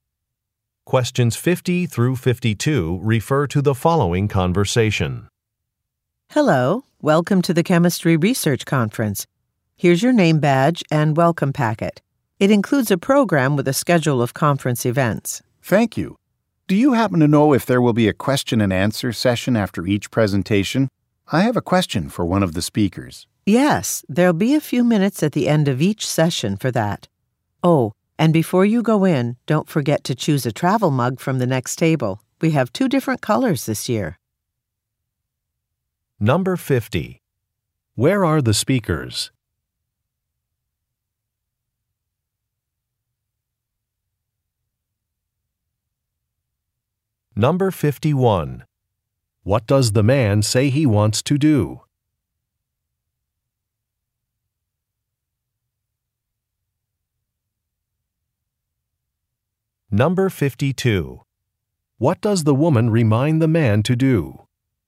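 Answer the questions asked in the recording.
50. At a conference
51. Ask a speaker a question
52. Choose a travel mug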